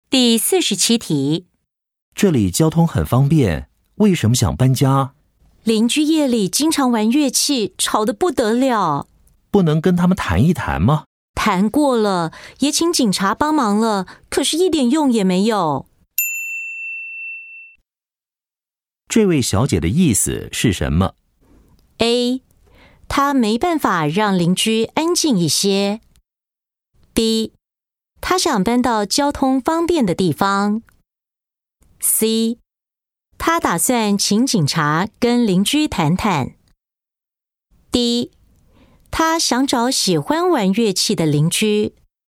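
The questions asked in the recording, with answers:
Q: 这位小姐的意思是什么?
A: A: 她没办法让邻居安静一些。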